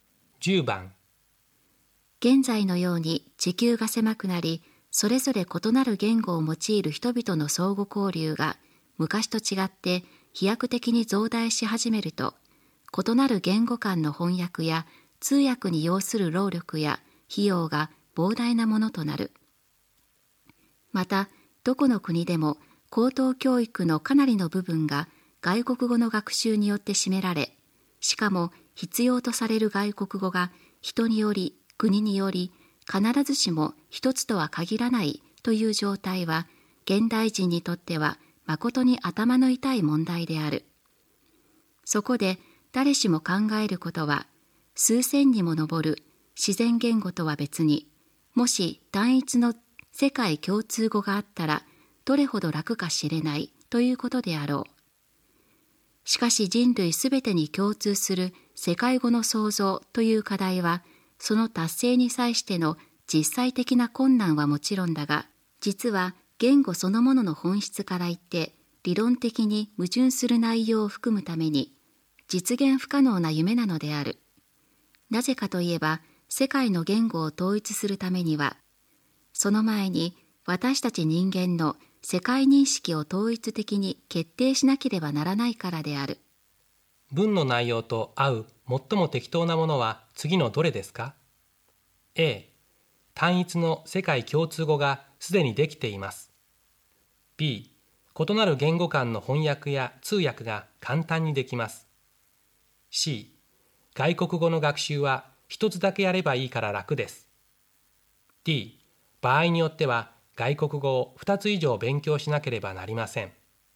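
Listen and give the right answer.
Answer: D: 場合によっては外国語を2つ以上勉強しなければなりません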